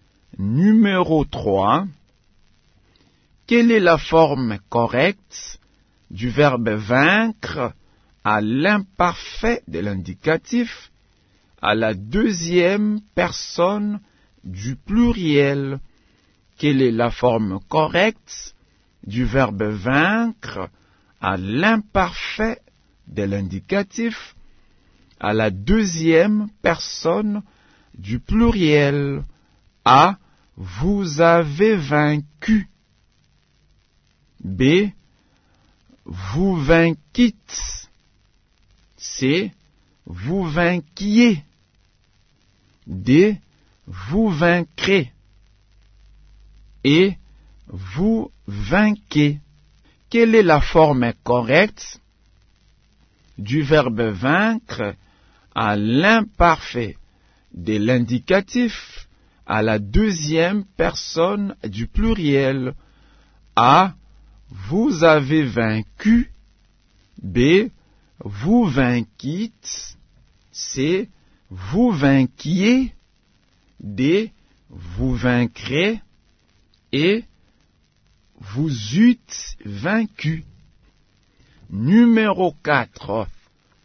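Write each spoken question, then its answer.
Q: Quelle est la forme correcte du verbe vaincre à l'imparfait de l'indicatif à la deuxième personne du pluriel?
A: C: Vous vainquiez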